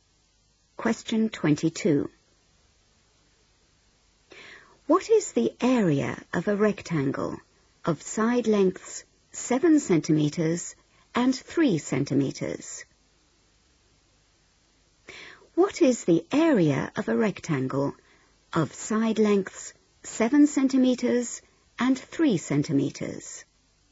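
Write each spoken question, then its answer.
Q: What is the area of a rectangle of side lengths 7 centimeters and 3 centimeters?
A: 21 cm2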